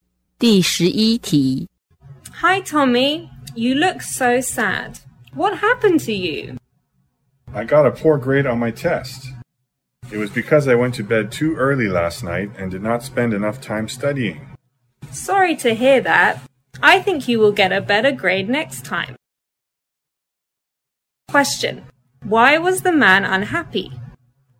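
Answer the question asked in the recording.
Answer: He got a poor grade on his test.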